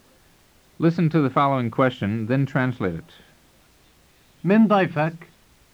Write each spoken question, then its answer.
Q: Listen to the following question, then translate it.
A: It means, who is your guest?